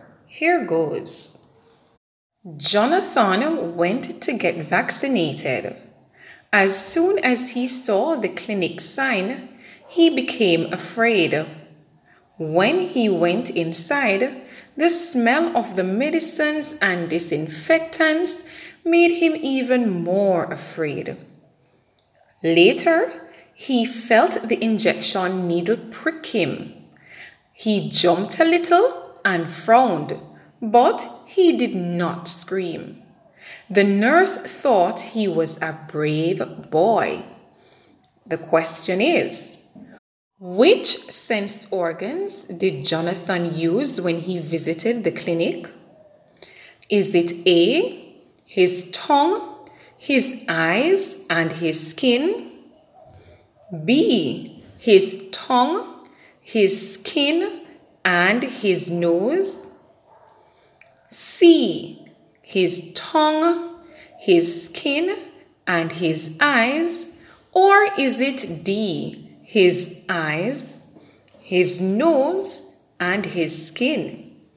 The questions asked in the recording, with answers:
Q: The question is, which sense organs did Jonathan use when he visited the clinic?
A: Boys and girls, if your answer was D, his eyes, his nose, and his skin, you are correct.